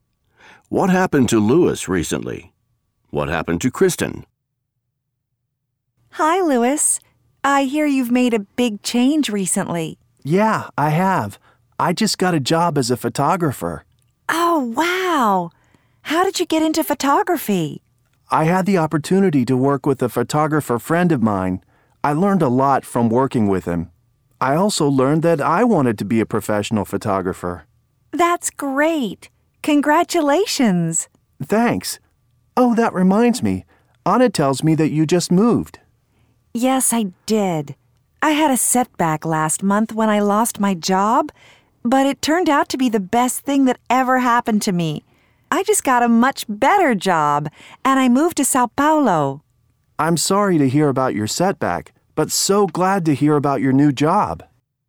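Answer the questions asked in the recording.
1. He got a job as a photographer.
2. She lost her job, then got a much better job and moved to Sao Paulo.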